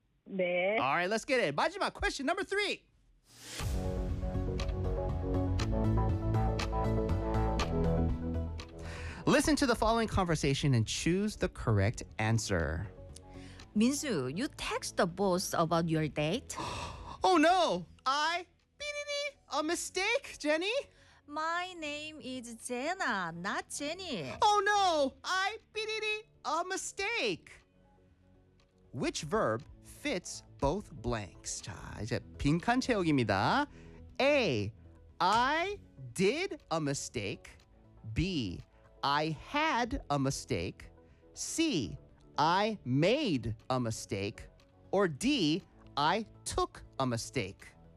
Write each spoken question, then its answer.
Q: Which verb fits both blanks?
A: 이거는 made a mistake예요.